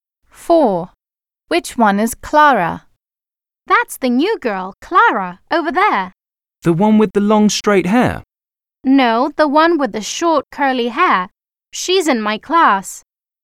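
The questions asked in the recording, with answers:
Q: Which one is Clara?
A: The one with short curly hair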